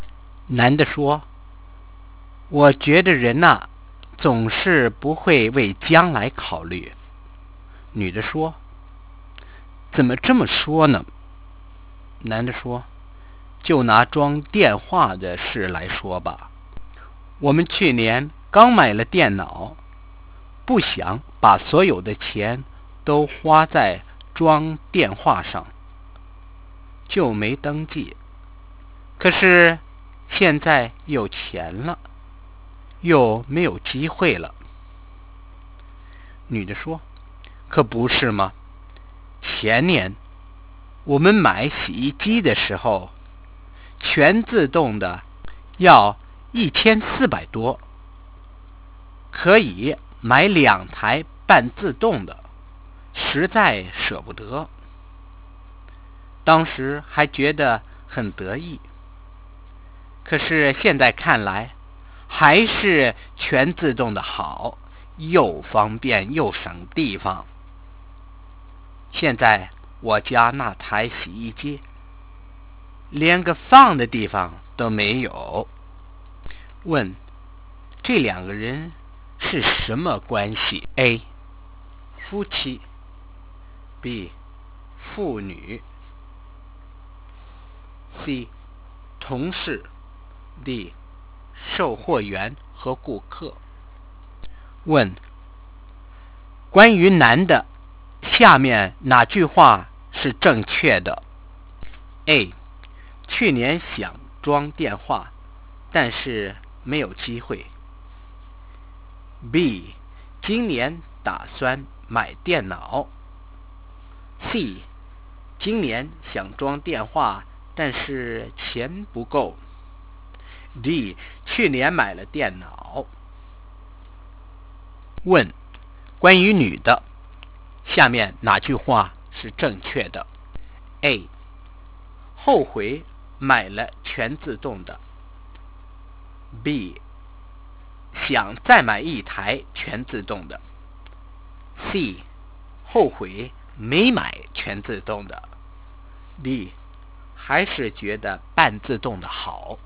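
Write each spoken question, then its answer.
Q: 关于男的,下面哪句话是正确的?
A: D: 去年买了电脑。

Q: 关于女的,下面哪句话是正确的?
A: C: 后悔没买全自动的。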